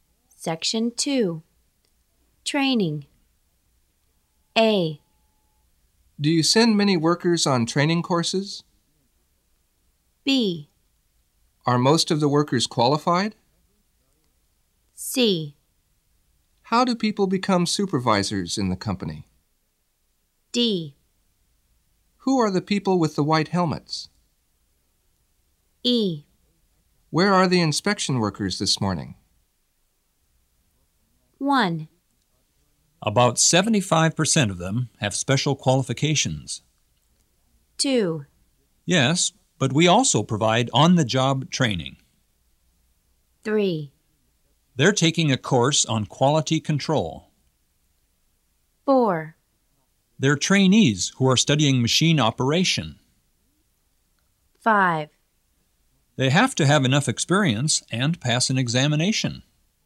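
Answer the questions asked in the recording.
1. B: Are most of the workers qualified?
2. A: Do you send many workers on training courses?
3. E: Where are the inspection workers this morning?
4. D: Who are the people with the white helmets?
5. C: How do people become supervisors in the company?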